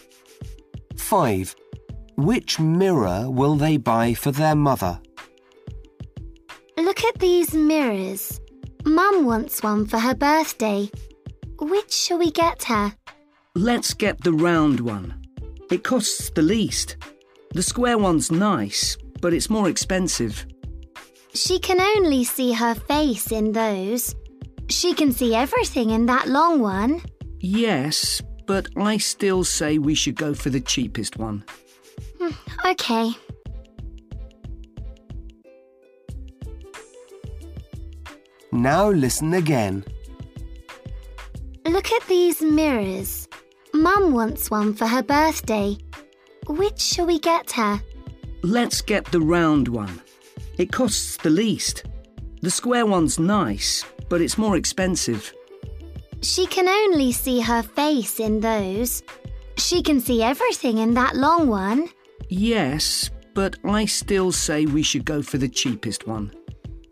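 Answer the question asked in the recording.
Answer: the round one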